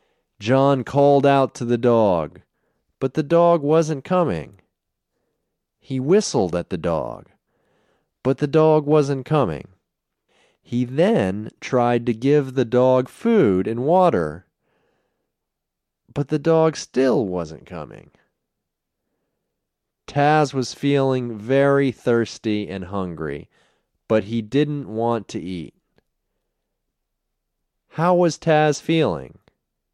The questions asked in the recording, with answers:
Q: How was Taz feeling?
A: Taz was feeling very thirsty and hungry.